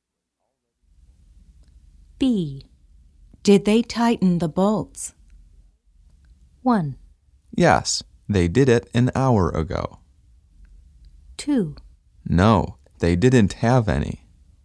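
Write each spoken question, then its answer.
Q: Did they tighten the bolts?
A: 1: Yes, they did it an hour ago.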